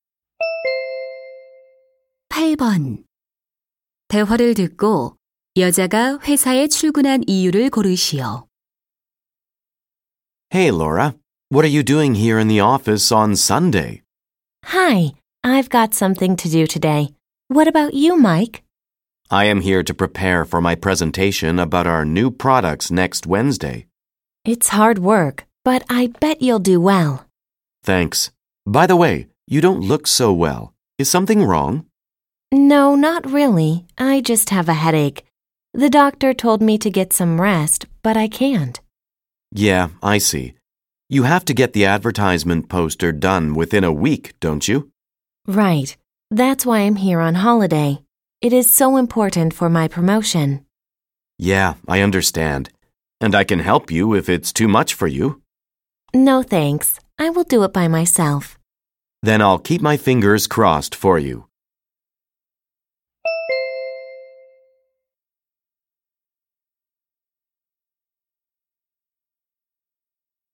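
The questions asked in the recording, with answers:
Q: 대화를 듣고 여자가 회사에 출근한 이유를 고르시오.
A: 광고 포스터를 완성하기 위해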